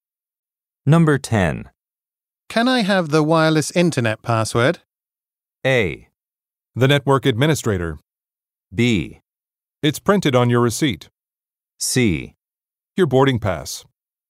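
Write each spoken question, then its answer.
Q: Can I have the wireless internet password?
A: B: It's printed on your receipt.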